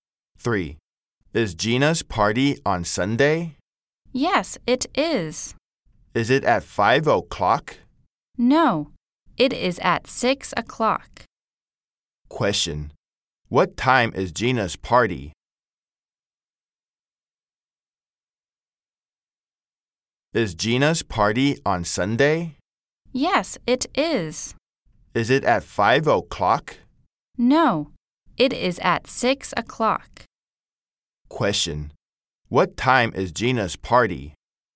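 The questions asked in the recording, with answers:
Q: Question,What time is Gina's party?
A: 6 o'clock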